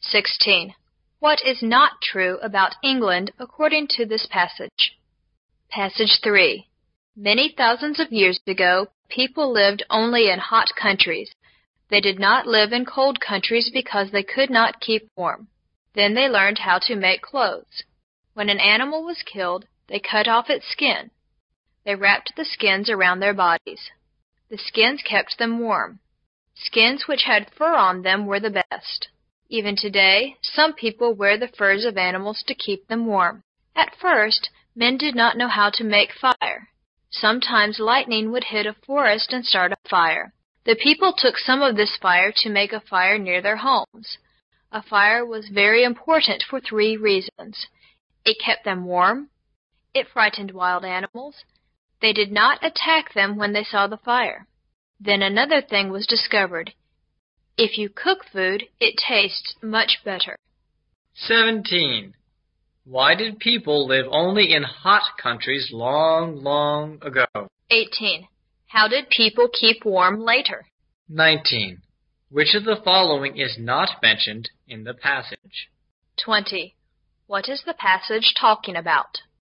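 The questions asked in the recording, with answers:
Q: Why did people live only in hot countries long, long ago?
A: Because they could not keep warm in cold countries

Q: How did people keep warm later?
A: By wrapping animal skins around their bodies, and with fire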